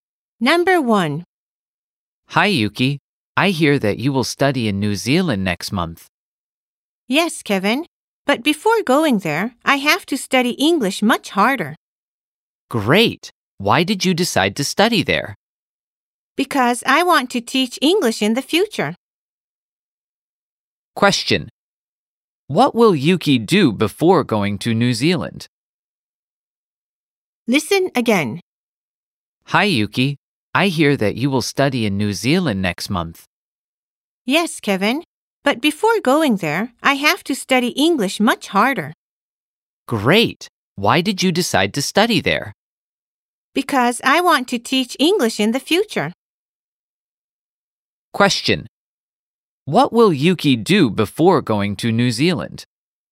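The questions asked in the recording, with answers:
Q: What will Yuki do before going to New Zealand?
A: Study English much harder.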